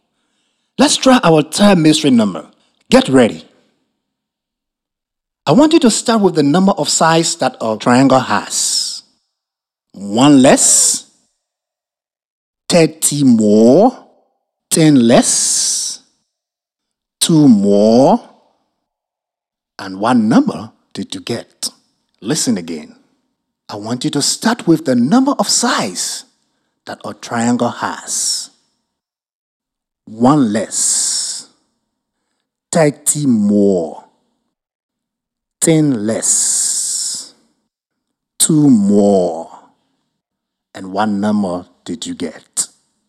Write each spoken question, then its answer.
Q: 1 less, 30 more, 10 less, 2 more, and what number did you get?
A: The mystery number is 24.